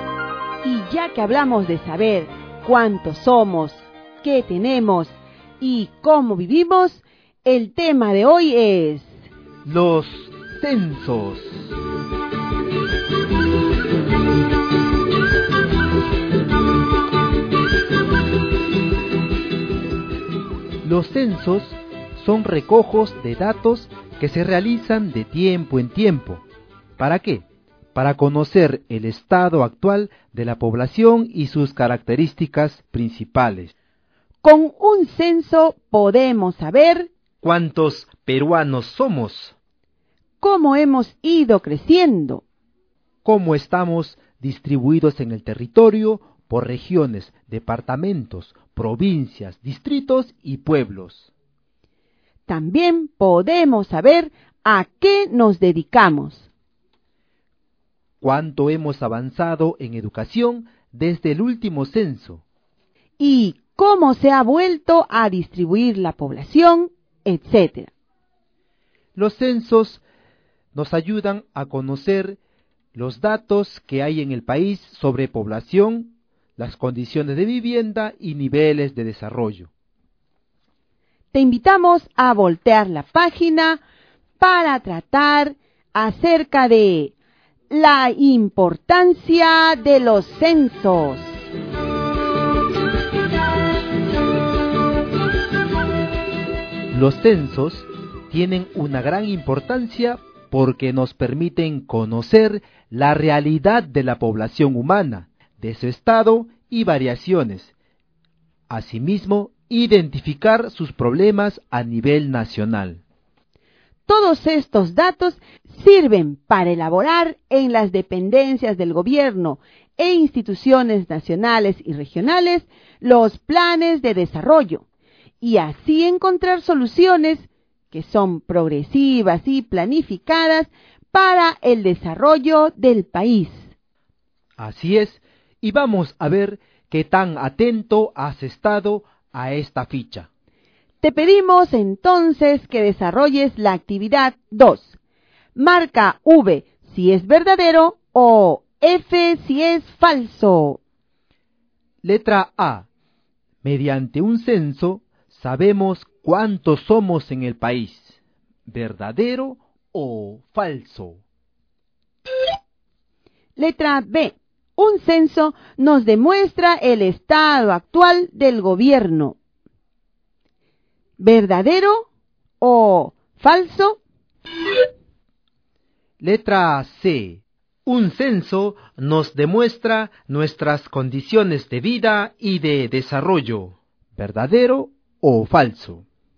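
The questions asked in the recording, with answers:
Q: Letra A. Mediante un censo sabemos cuántos somos en el país. ¿Verdadero o falso?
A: Verdadero

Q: Letra B. Un censo nos demuestra el estado actual del gobierno. ¿Verdadero o falso?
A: Falso

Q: Letra C. Un censo nos demuestra nuestras condiciones de vida y de desarrollo. ¿Verdadero o falso?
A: Verdadero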